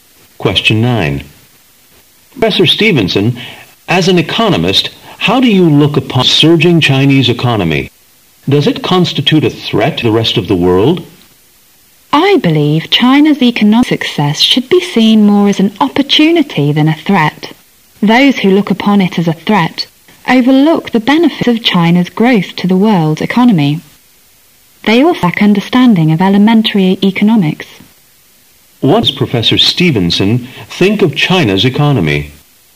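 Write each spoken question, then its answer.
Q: What does Professor Stevenson think of China's economy?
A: It is more an opportunity than a threat.

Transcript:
A
[解析] M: Professor Stevenson, as an economist, how do you look upon the surging Chinese economy? Does it constitute a threat to the rest of the world? W: I believe China's economic success should be seen more as an opportunity than a threat. Those who looked upon it as a threat overlooked the benefits of china's growth to the world's economy. They also lack the understanding of elementary economics. Q: What does Professor Stevenson think of China's economy?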